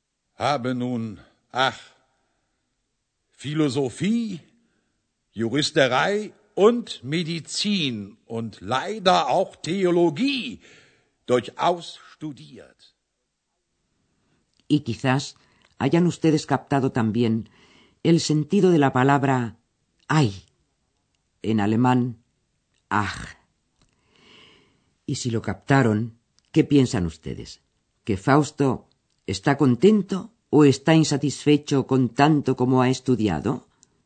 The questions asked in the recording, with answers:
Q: ¿Que Fausto está contento o está insatisfecho con tanto como ha estudiado?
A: Sí, efectivamente, está insatisfecho.